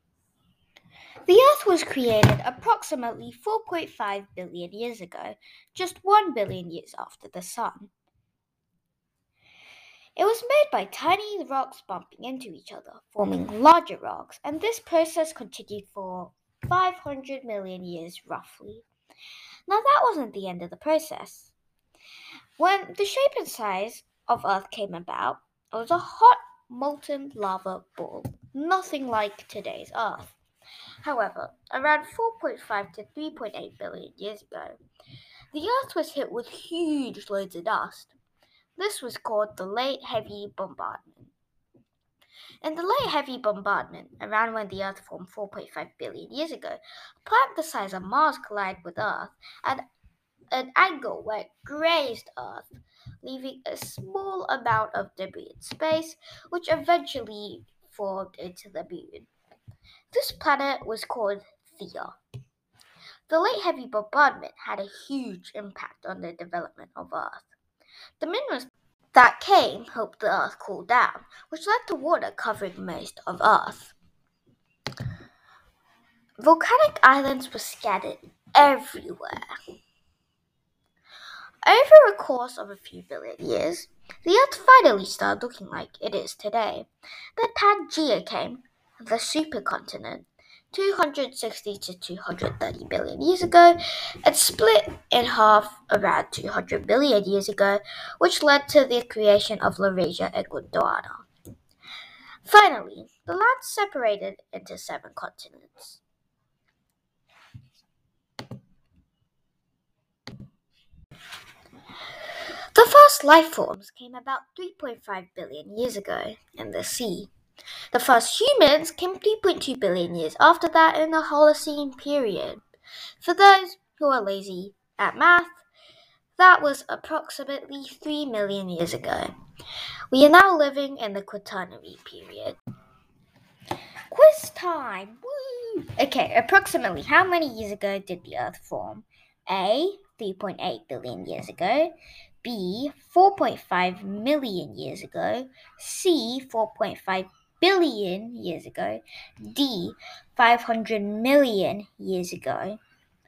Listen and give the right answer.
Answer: It was C. 4.5 billion years ago.